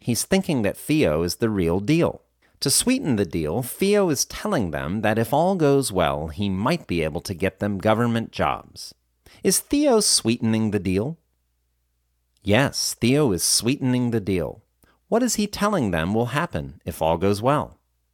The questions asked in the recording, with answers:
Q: What is he telling them will happen if all goes well?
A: He is telling them that if all goes well, he might be able to get them government jobs.